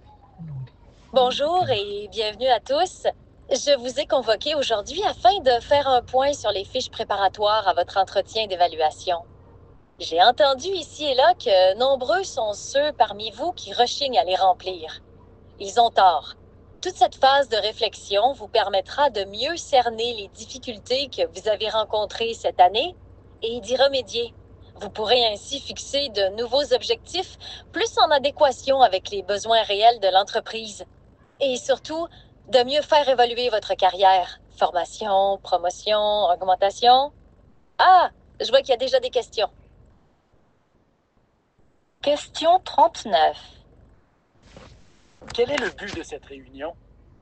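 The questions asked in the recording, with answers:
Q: Quel est le but de cette réunion?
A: Faire un point sur les fiches préparatoires à l'entretien d'évaluation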